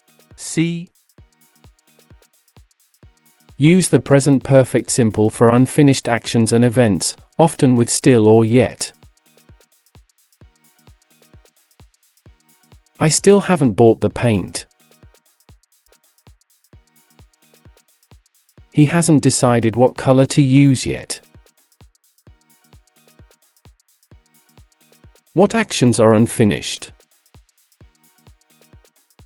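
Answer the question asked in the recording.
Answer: Buying the paint and deciding what color to use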